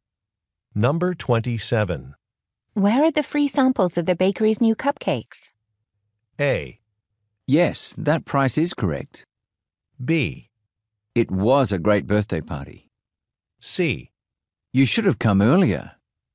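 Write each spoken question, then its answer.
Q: Where are the free samples of the bakery's new cupcakes?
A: C: You should have come earlier.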